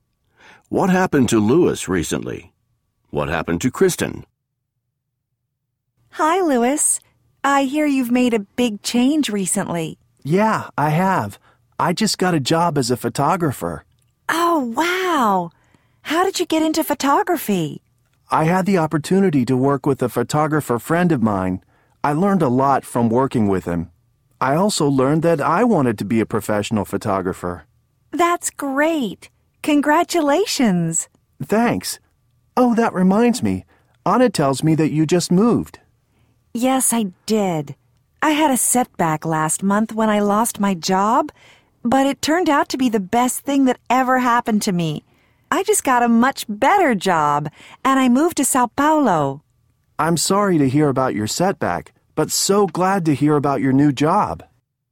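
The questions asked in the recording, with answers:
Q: What happened to Lewis recently?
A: He got a job as a photographer.

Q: What happened to Kristen?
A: She lost her job, then got a much better job and moved to Sao Paulo.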